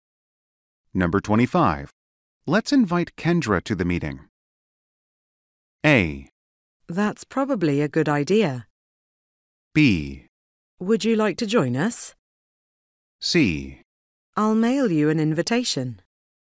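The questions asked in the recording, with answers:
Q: Let's invite Kendra to the meeting.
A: A: That's probably a good idea.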